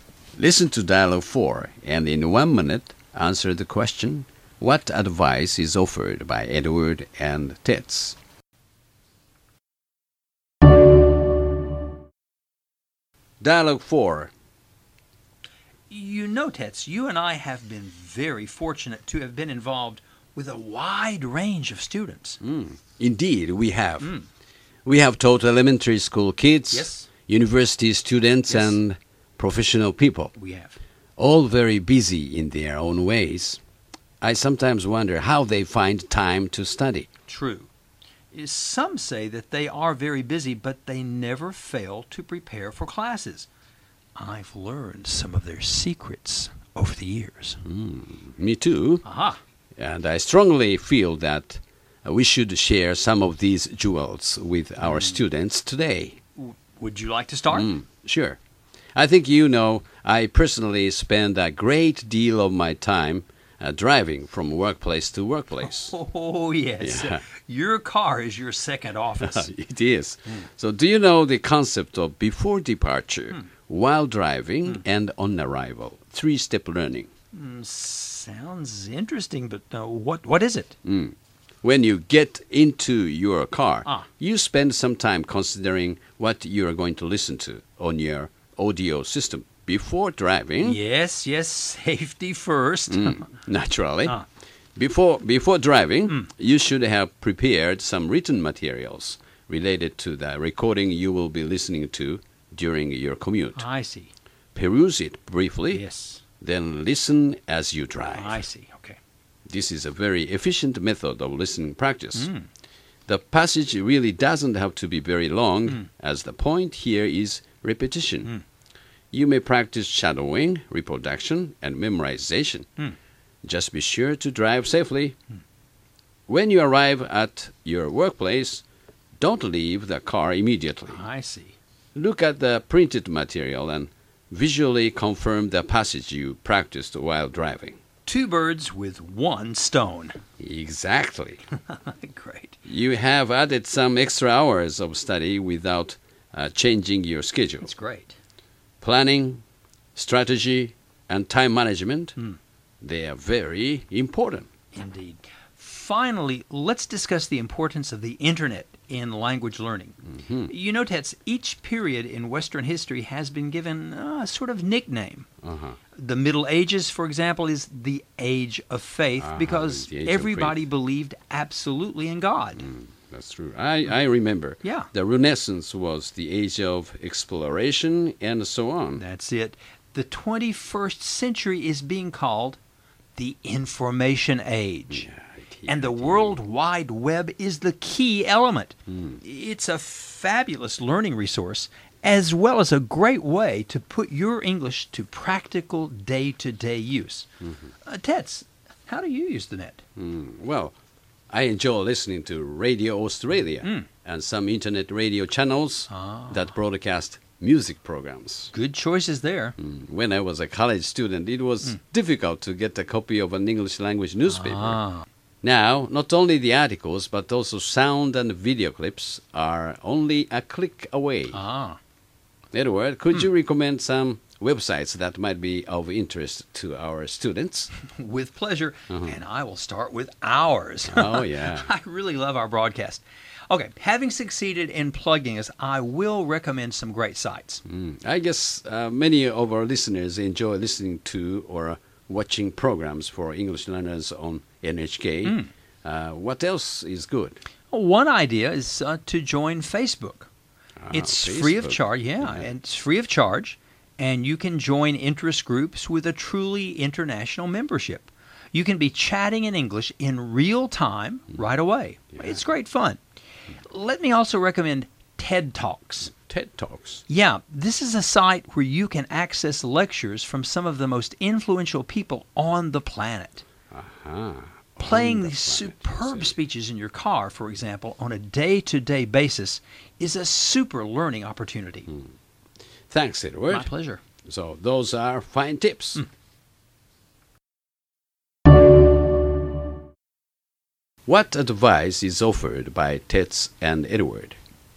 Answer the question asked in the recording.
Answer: We really should not say, I don't have time to study.